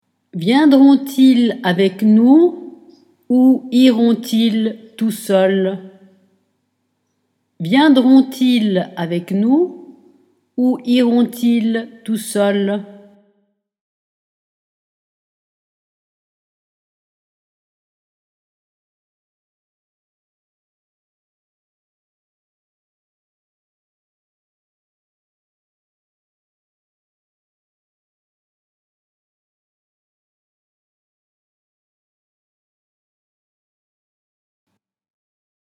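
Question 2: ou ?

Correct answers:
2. Viendront-ils avec nous / iront-ils tout seuls

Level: Dettato di francese A2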